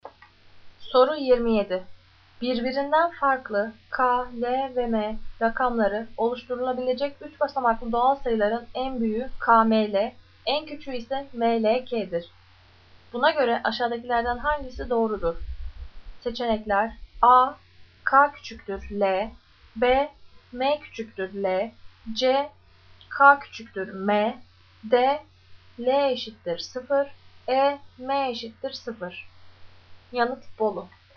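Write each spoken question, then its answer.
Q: Buna göre aşağıdakilerden hangisi doğrudur?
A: D: L eşittir 0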